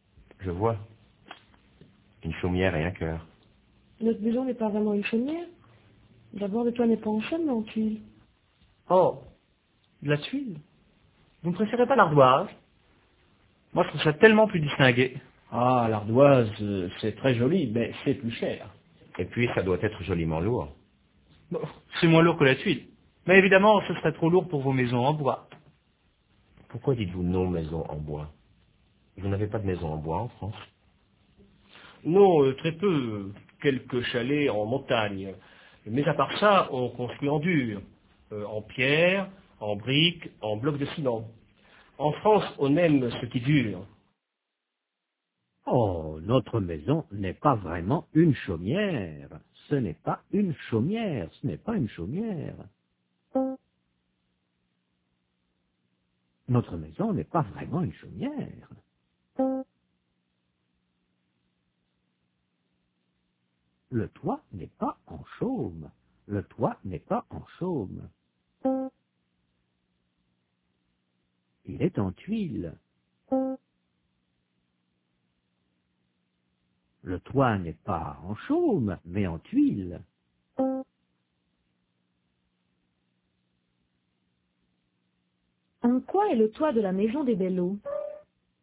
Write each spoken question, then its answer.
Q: En quoi est le toit de la maison des Belleau?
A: En tuiles.